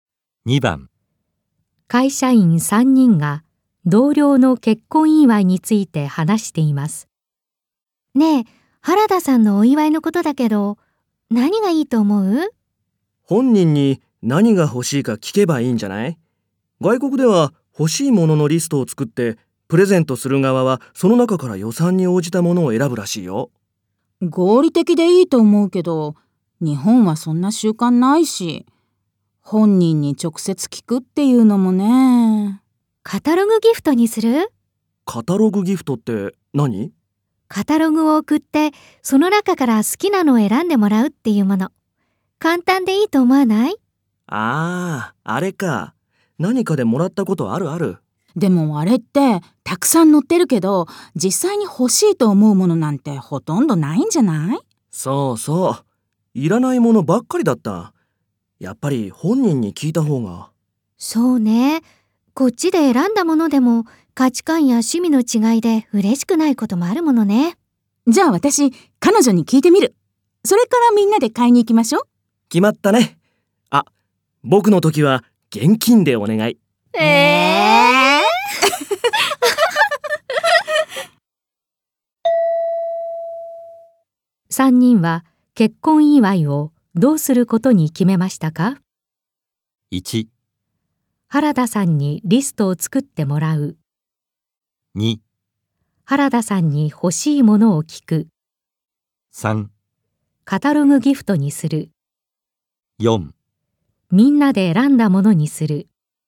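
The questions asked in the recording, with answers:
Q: 3人は結婚祝いをどうすることに決めましたか?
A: 2: 原田さんに欲しいものを聞く。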